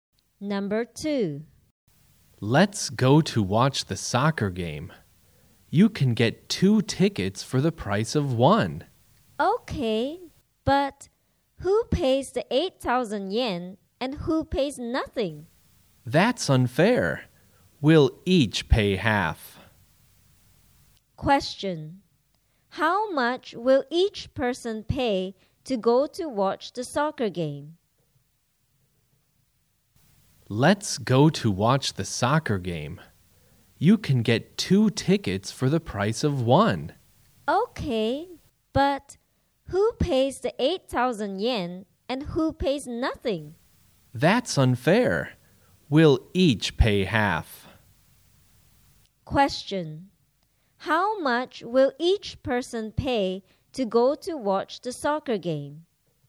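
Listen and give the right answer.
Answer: 4,000 yen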